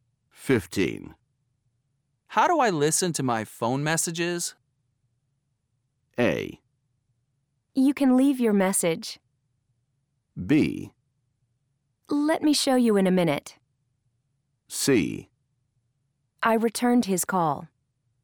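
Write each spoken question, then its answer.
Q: How do I listen to my phone messages?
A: B: Let me show you in a minute.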